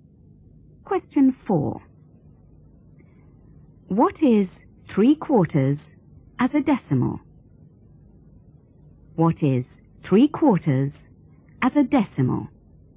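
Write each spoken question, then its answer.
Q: What is 3/4 as a decimal?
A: 0.75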